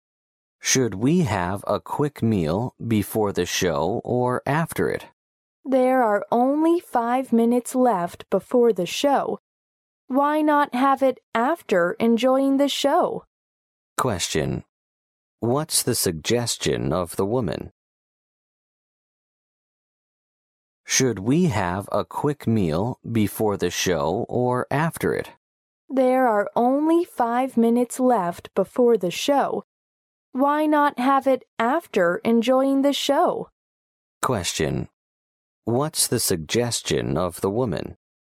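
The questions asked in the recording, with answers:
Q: What's the suggestion of the woman?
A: Have the meal after the show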